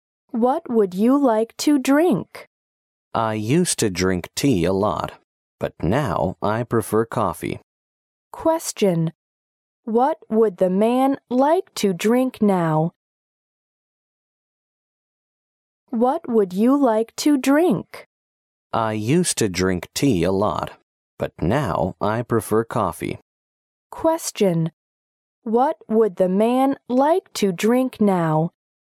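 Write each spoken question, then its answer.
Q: What would the man like to drink now?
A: Coffee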